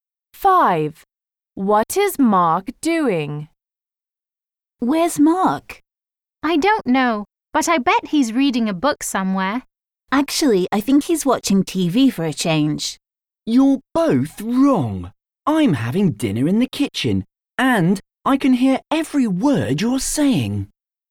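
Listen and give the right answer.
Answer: Having dinner in the kitchen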